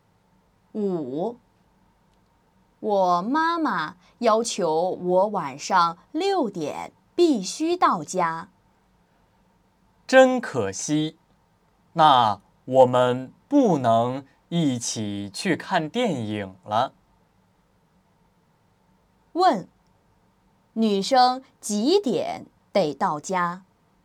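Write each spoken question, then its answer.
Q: 问,女生几点得到家?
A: 晚上6点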